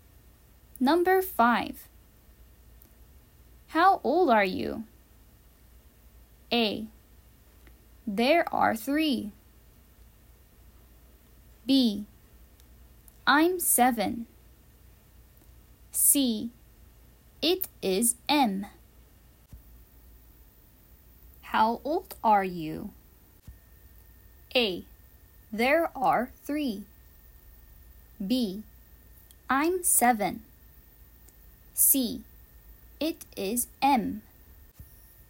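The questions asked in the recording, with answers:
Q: How old are you?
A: B: I'm 7.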